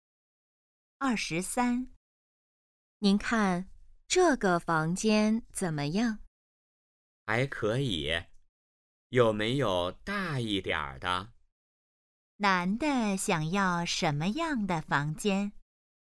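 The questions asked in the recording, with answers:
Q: 男的想要什么样的房间?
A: 大一点的房间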